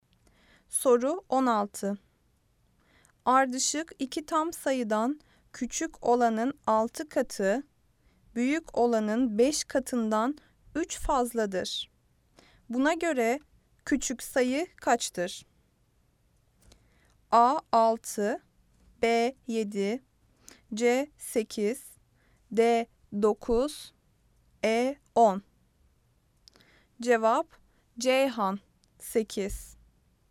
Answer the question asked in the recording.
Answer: Cevap Ceyhan 8.